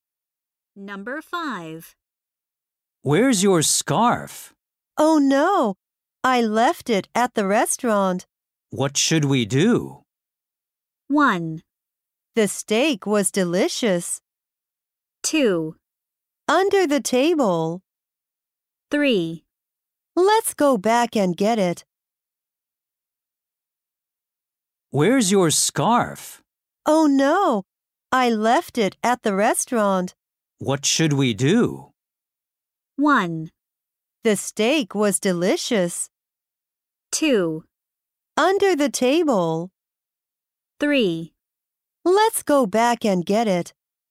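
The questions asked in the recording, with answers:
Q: What should we do?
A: 3: Let's go back and get it.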